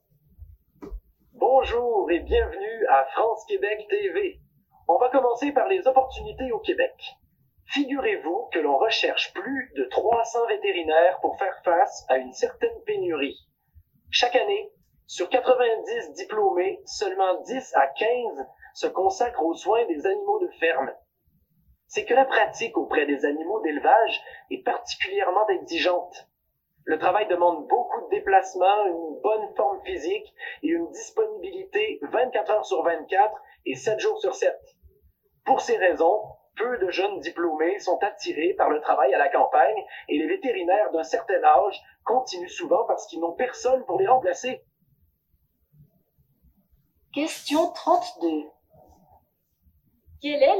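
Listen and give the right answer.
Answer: Une pénurie de vétérinaires pour les animaux de ferme au Québec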